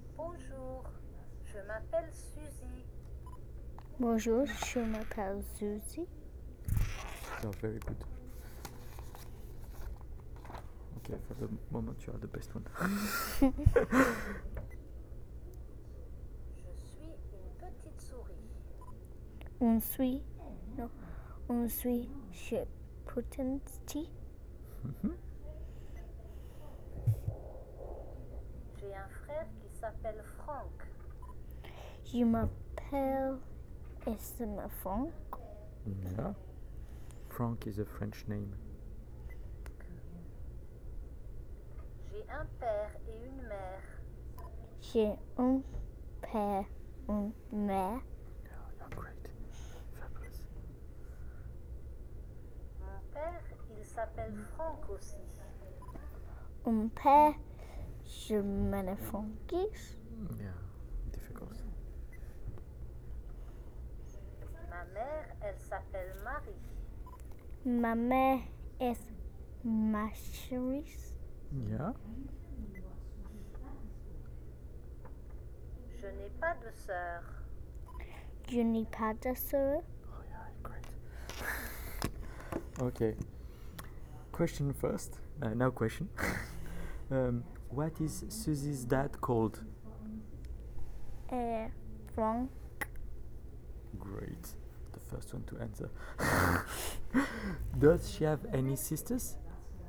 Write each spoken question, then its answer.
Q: What is Suzy's dad called?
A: Franck.

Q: Does she have any sisters?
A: No, she doesn't have.